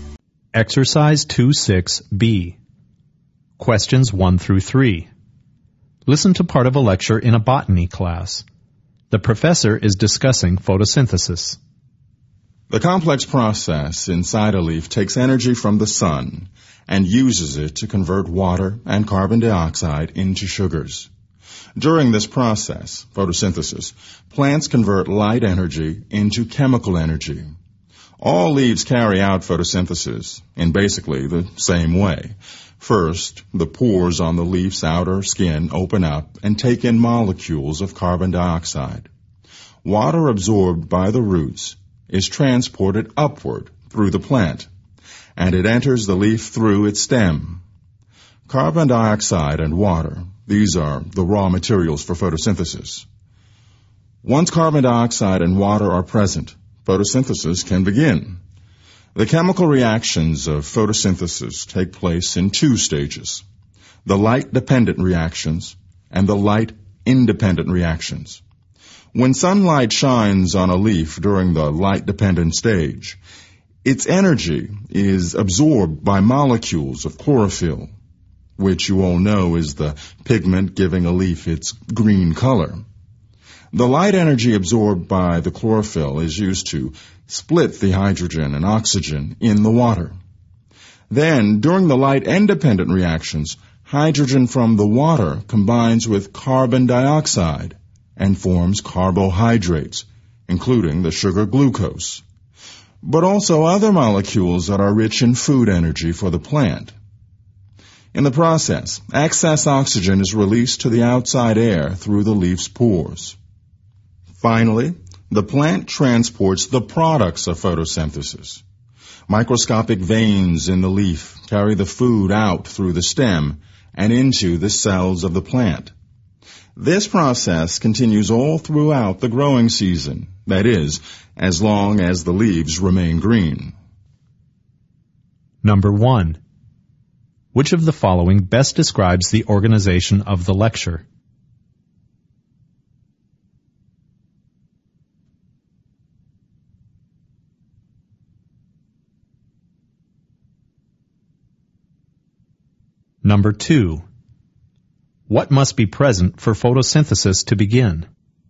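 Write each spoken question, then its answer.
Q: What must be present for photosynthesis to begin?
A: Carbon dioxide and water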